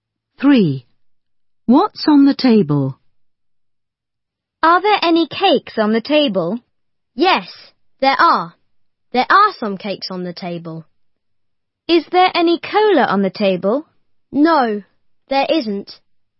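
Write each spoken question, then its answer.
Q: What's on the table?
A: Some cakes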